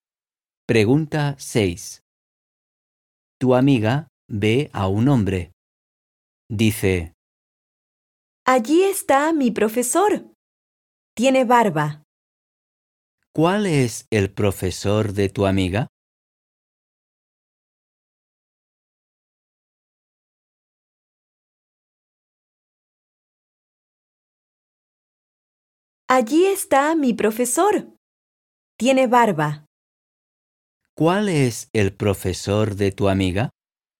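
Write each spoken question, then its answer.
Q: ¿Cuál es el profesor de tu amiga?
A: El que tiene barba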